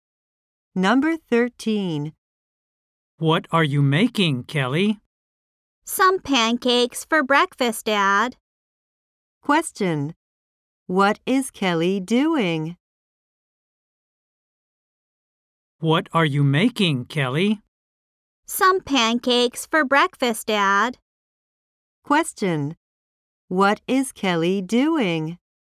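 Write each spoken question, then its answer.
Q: What is Kelly doing?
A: Making pancakes for breakfast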